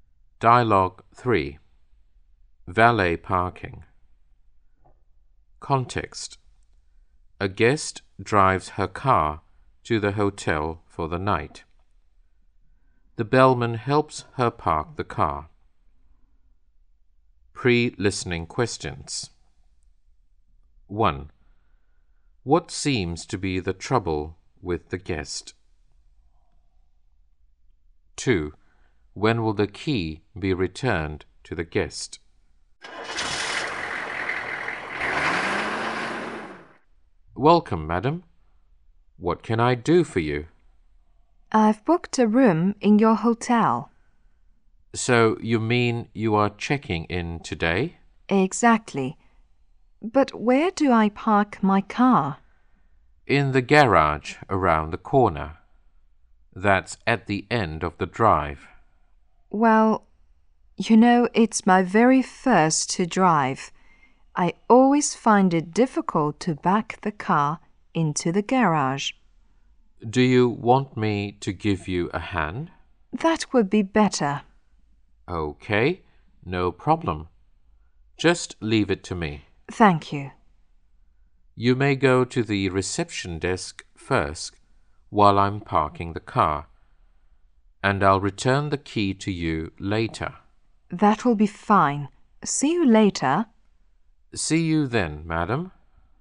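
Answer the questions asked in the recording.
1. She finds it difficult to back the car into the garage.
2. After the bellman has parked the car, while she is at the reception desk.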